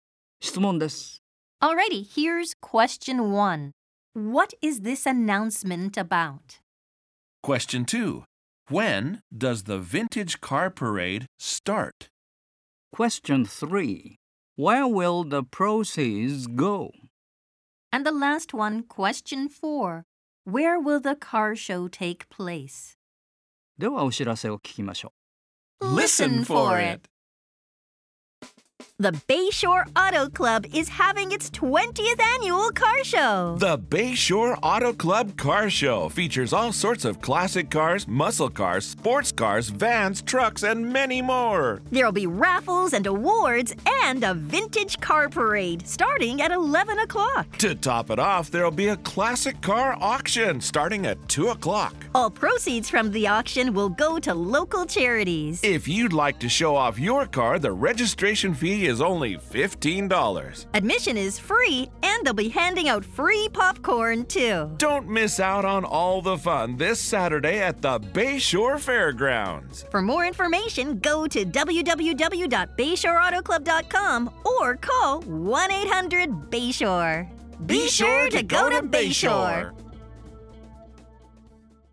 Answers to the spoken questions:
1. The Bayshore Auto Club is having its 20th annual car show.
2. Well, the answer is at 11 o'clock.
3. All proceeds will go to local charities.
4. At the Bayshore Fairgrounds.